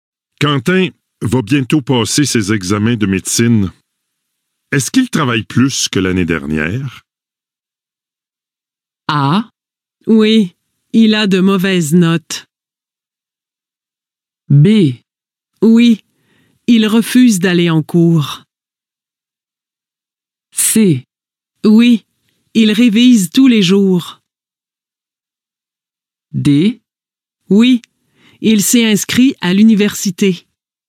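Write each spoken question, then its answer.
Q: Est-ce qu'il travaille plus que l'année dernière?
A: C: Oui, il révise tous les jours.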